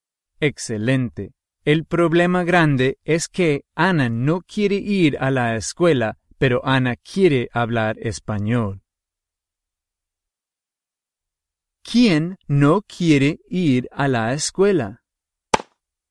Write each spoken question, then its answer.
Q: ¿Quién no quiere ir a la escuela?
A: Ana.